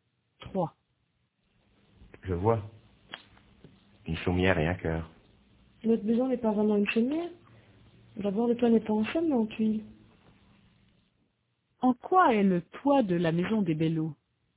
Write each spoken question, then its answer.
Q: En quoi est le toit de la maison des Bellots ?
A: En tuiles.